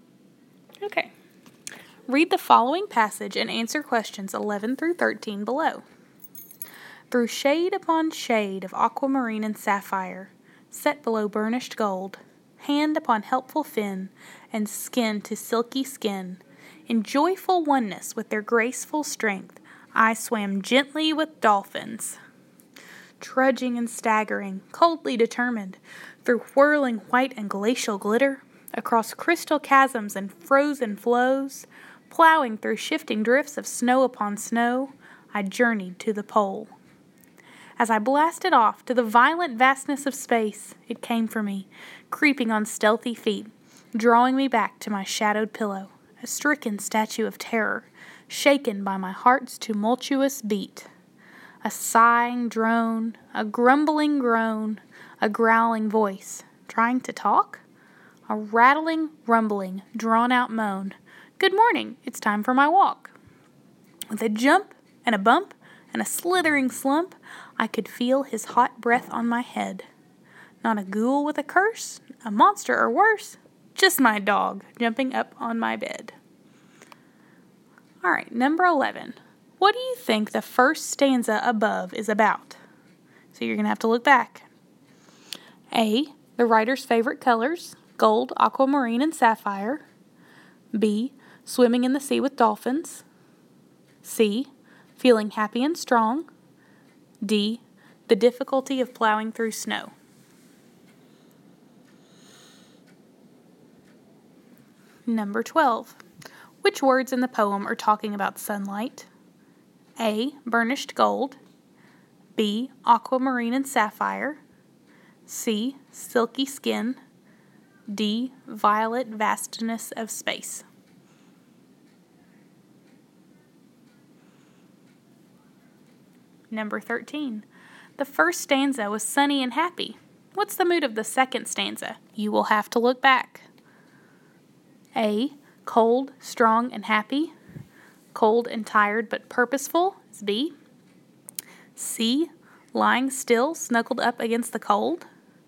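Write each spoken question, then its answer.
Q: What do you think the first stanza above is about?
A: B: swimming in the sea with dolphins.

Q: Which words in the poem are talking about sunlight?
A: A: burnished gold.

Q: What's the mood of the second stanza?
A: B: Cold and tired but purposeful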